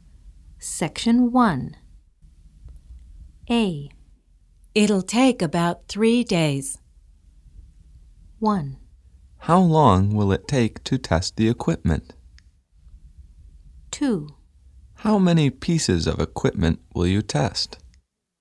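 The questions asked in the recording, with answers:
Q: Find the correct question or statement.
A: 1: How long will it take to test the equipment?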